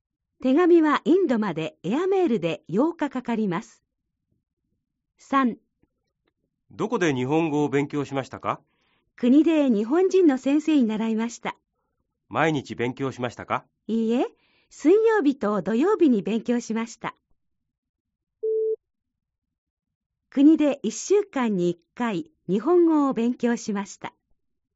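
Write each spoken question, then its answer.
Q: 国で1週間に1回日本語を勉強しました。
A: ×(水曜日と土曜日、週2回)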